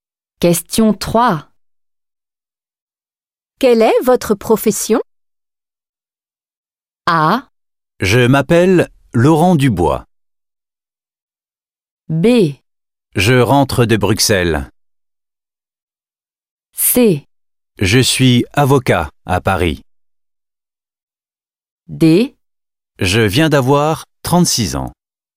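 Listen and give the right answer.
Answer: C: Je suis avocat à Paris.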